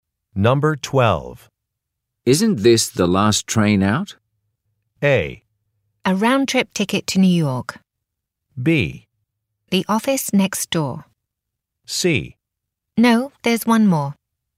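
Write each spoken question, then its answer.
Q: Isn't this the last train out?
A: C: No, there's one more.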